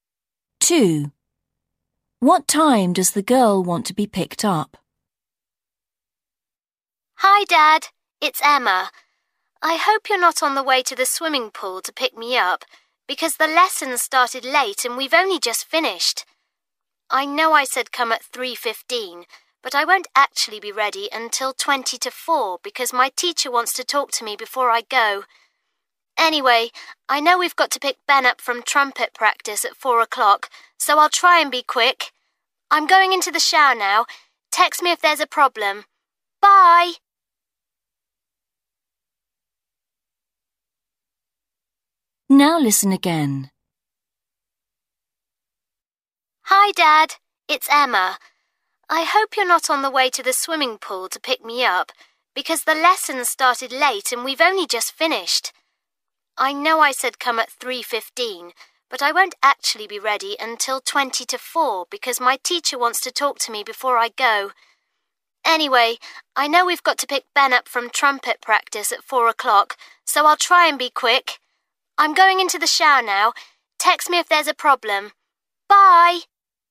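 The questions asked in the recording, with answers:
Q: What time does the girl want to be picked up?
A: 3:40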